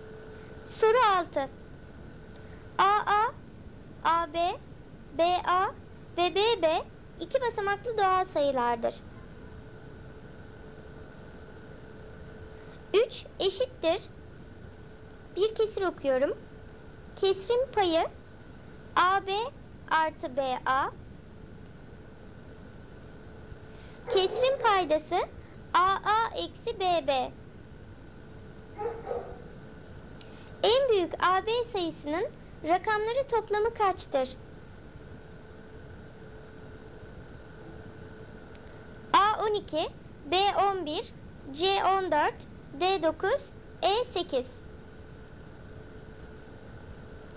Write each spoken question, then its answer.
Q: En büyük AB sayısının rakamları toplamı kaçtır?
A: Doğru cevap A12.